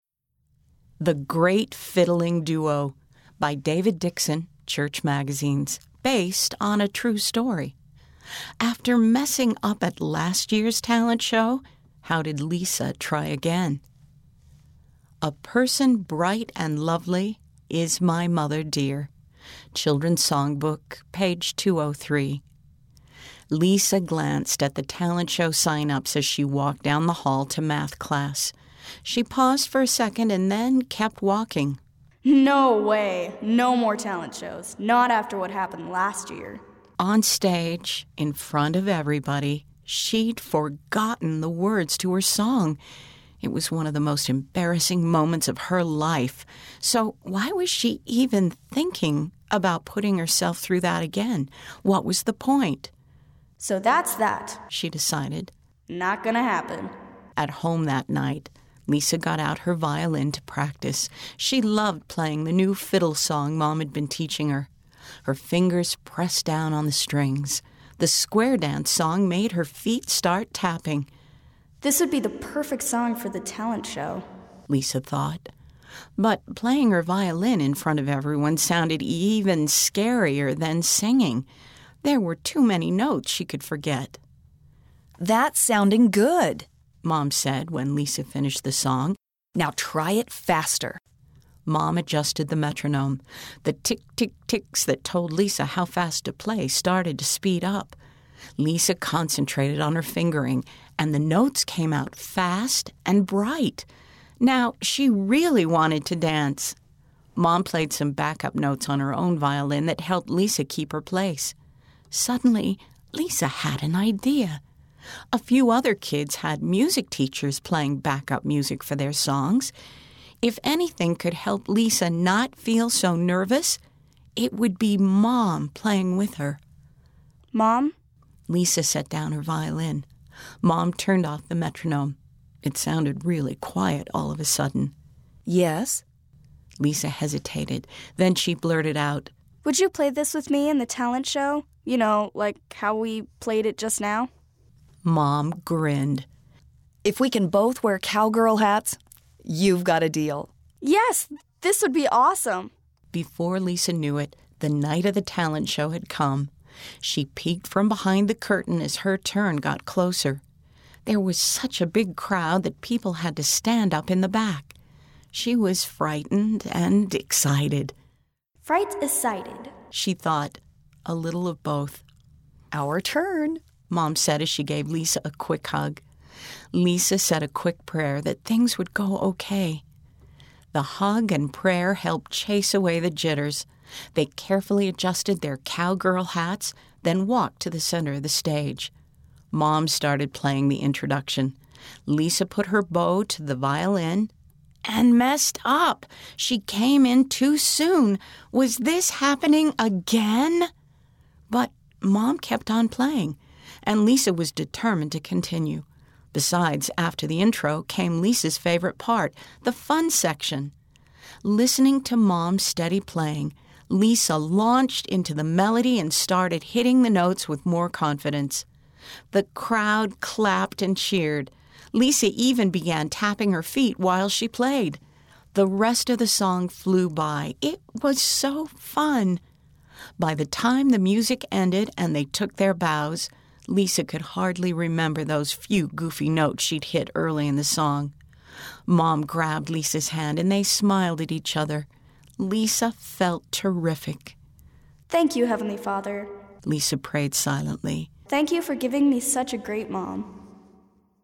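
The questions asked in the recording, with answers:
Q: After messing up at last year's talent show, how did Lisa try again?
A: She played a fiddle song on her violin in the talent show, with her mom playing backup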